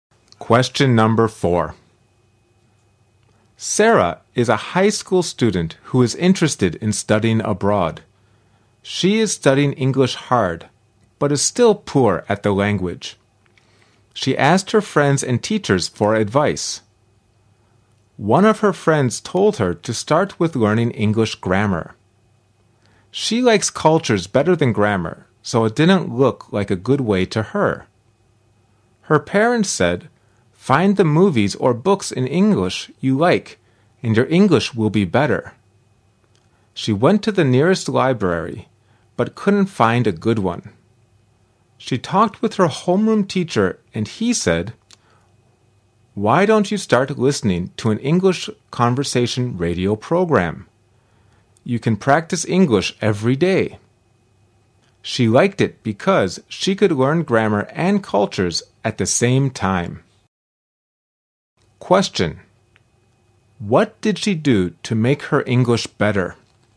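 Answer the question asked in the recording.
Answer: She listened to an English conversation radio program.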